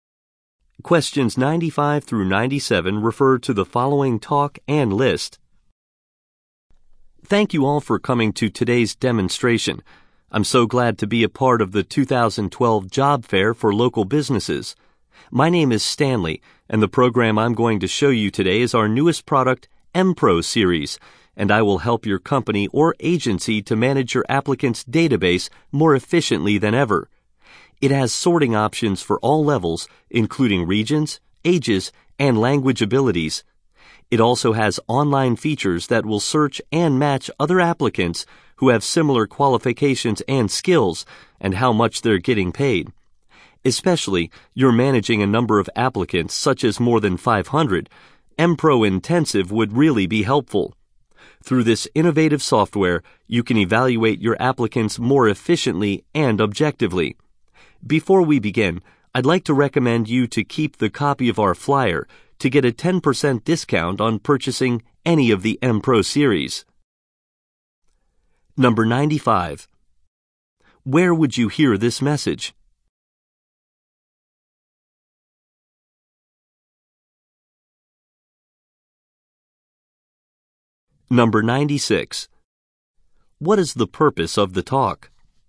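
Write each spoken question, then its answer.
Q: Where would you hear this message?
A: At a job fair

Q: What is the purpose of the talk?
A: To demonstrate new software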